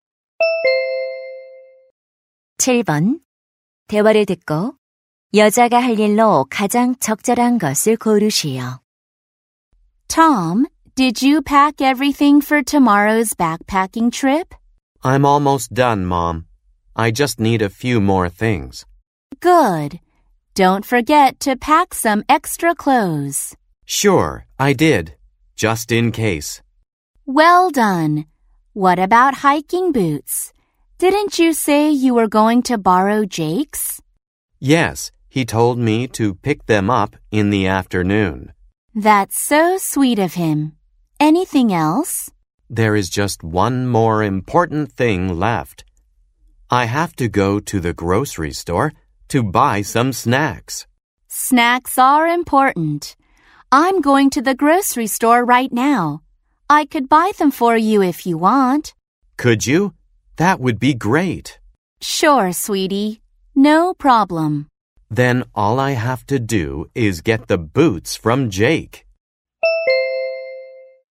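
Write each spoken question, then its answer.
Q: 대화를 듣고 여자가 할 일로 가장 적절한 것을 고르시오.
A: 간식 사 오기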